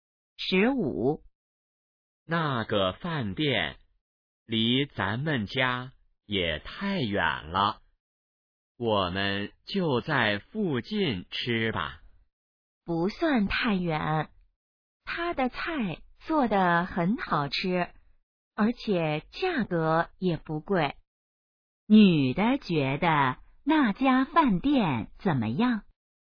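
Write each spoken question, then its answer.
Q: 女的觉得那家饭店怎么样?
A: 菜好吃,价格不贵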